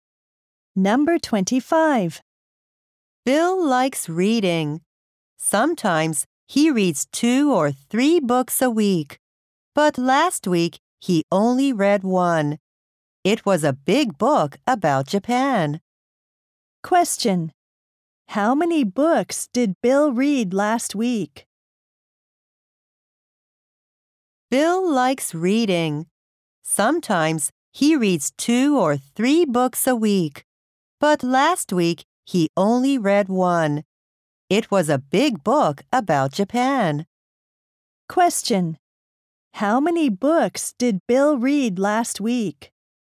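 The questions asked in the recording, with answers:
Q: How many books did Bill read last week?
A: One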